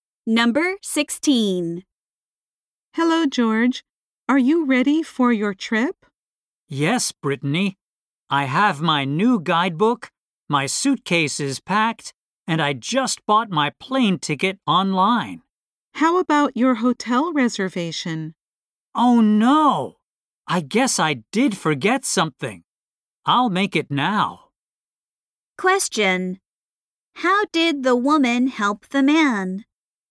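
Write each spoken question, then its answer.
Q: How did the woman help the man?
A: She reminded him to make a hotel reservation.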